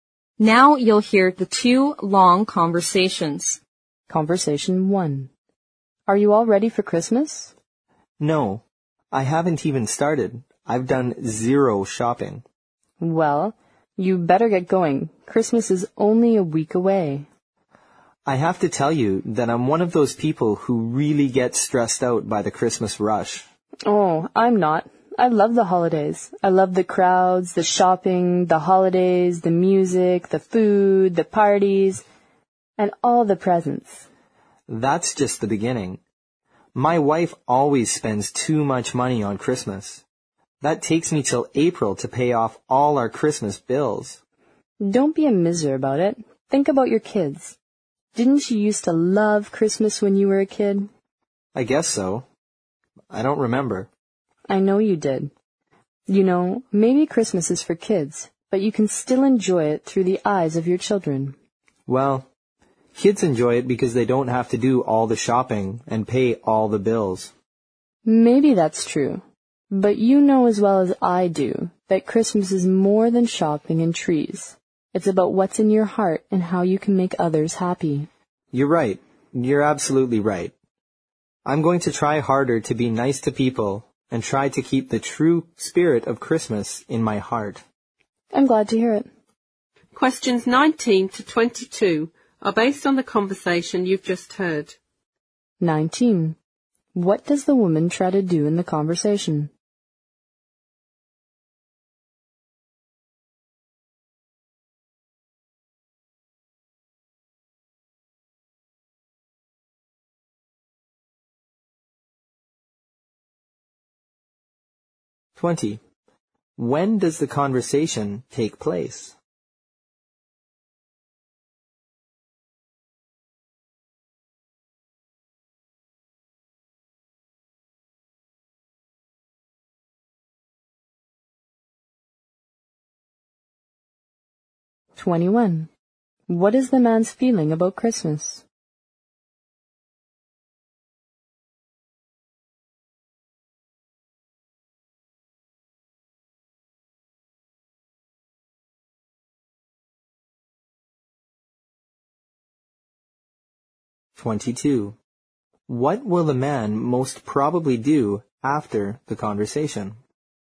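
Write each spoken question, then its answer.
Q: What does the woman try to do in the conversation?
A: Persuade the man to enjoy Christmas

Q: When does the conversation take place?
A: About a week before Christmas

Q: What is the man's feeling about Christmas?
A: It stresses him out.

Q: What will the man most probably do after the conversation?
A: Try to be nice to people and keep the true spirit of Christmas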